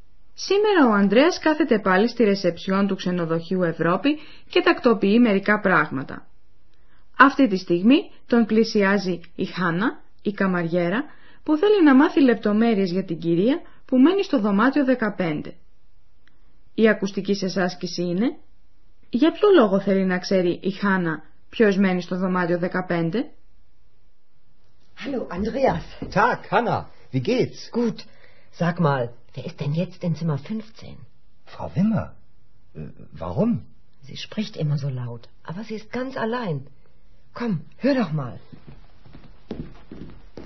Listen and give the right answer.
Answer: Η Χάνα ήθελε να μάθει ποιος είναι στο δωμάτιο 15 επειδή πρόσεξε ότι μιλούσε εκεί πάντοτε μια γυναίκα πολύ δυνατά.